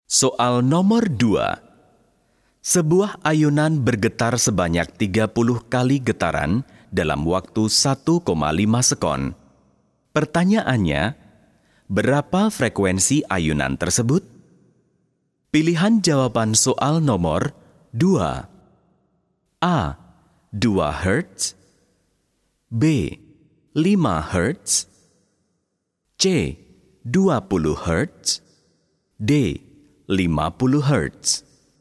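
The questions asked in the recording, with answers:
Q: Pertanyaannya, berapa frekuensi ayunan tersebut?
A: C: 20 Hz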